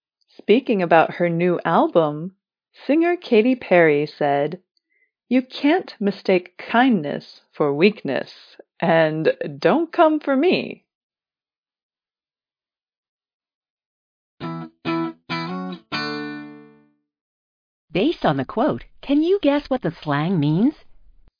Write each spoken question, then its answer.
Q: Based on the quote, can you guess what the slang means?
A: Come for is an expression meaning act aggressively toward someone, insult someone.